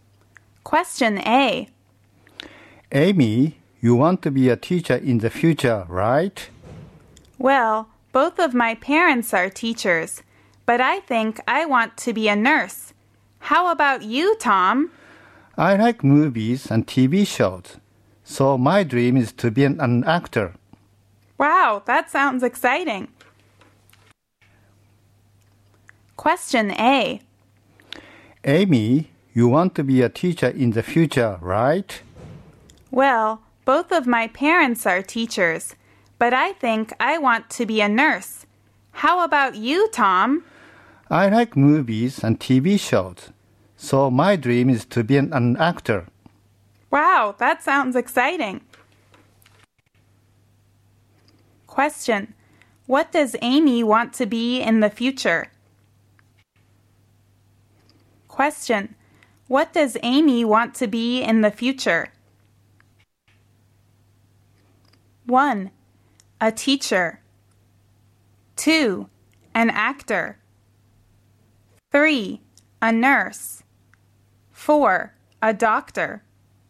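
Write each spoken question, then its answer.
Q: What does Amy want to be in the future?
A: 3: A nurse.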